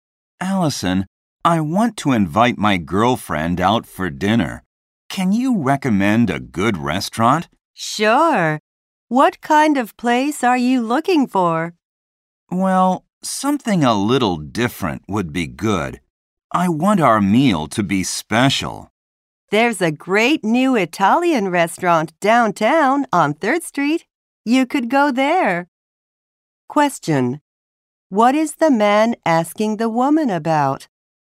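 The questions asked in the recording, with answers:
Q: What is the man asking the woman about?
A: A good restaurant to take his girlfriend to.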